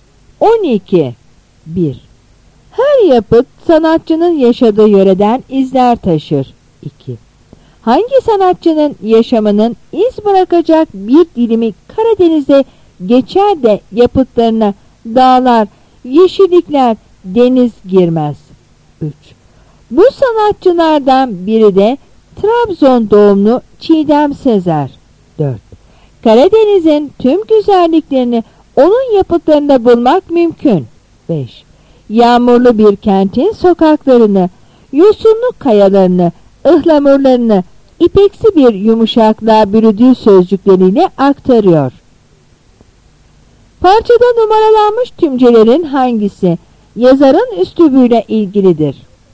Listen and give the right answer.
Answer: Yanıt E.